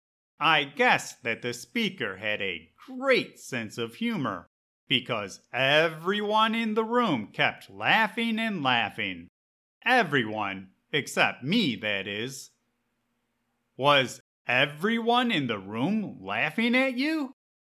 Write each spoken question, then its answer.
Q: Was everyone in the room laughing at you?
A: No. Everyone in the room was laughing at the speaker because he had a great sense of humor.